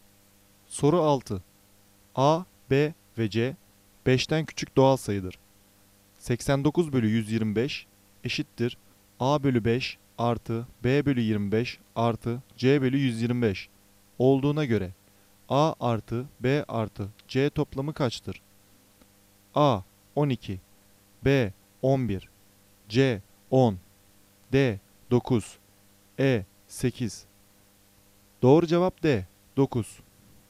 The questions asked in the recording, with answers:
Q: 89 bölü 125 eşittir A bölü 5 artı B bölü 25 artı C bölü 125 olduğuna göre A artı B artı C toplamı kaçtır?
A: Doğru cevap D 9